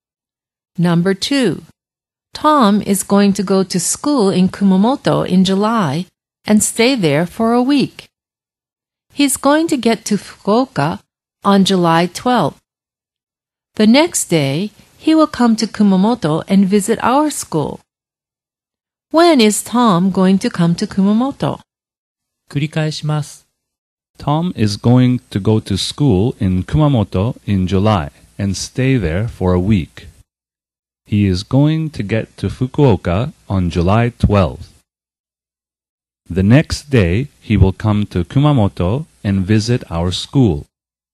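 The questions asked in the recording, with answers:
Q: When is Tom going to come to Kumamoto?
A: On July 13th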